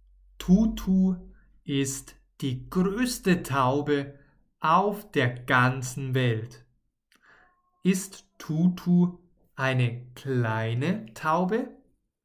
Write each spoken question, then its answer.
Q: Ist Tutu eine kleine Taube?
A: Nein, sie ist keine kleine Taube.